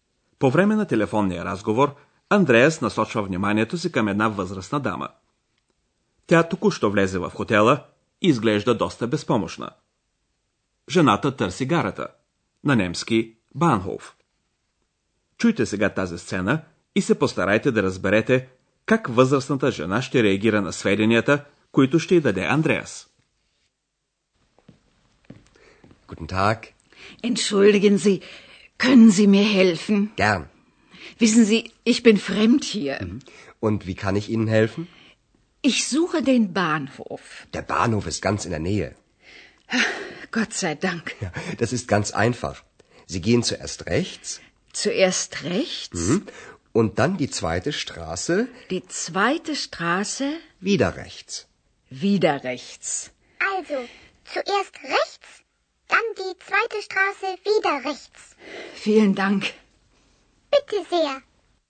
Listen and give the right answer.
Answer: Жената е много облегчена от получената информация и възкликва Слава Богу!